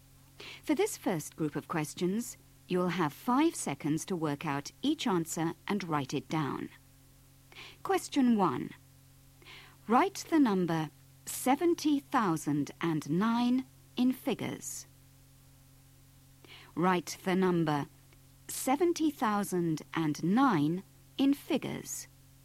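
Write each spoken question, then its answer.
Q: Write the number 70,009 in figures.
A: 70009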